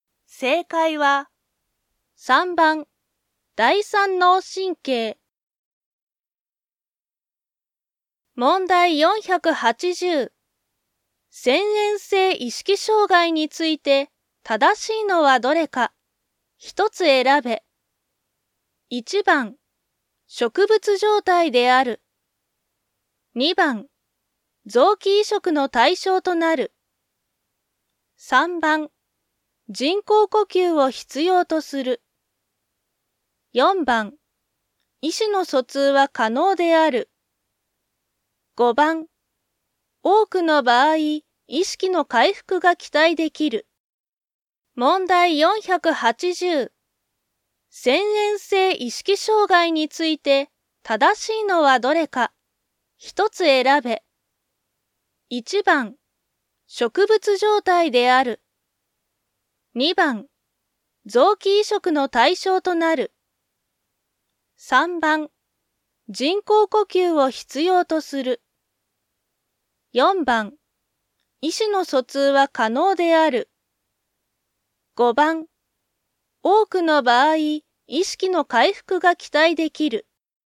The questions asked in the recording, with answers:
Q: 遷延性意識障害について、正しいのはどれか。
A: 1番、植物状態である。